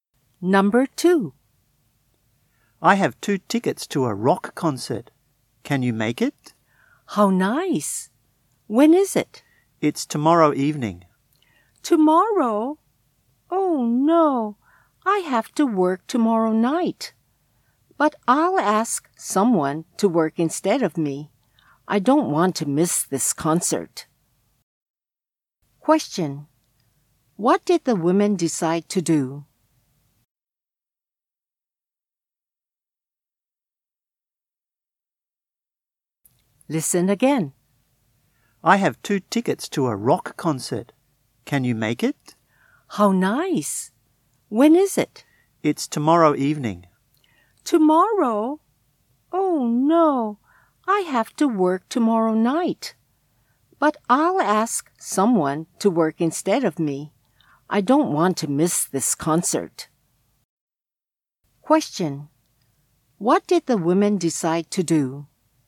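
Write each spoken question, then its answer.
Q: What did the women decide to do?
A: Ask someone to work for her so she can go to the concert.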